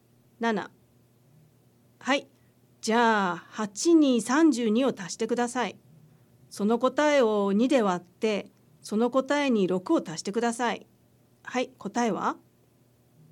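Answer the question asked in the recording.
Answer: 26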